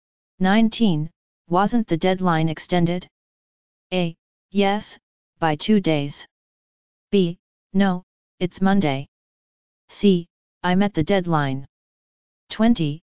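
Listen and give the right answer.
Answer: A: Yes, by 2 days.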